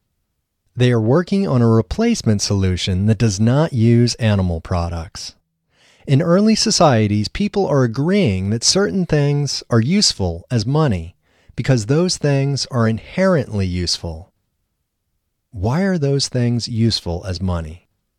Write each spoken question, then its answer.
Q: Why are those things useful as money?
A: They are useful as money because they are inherently useful.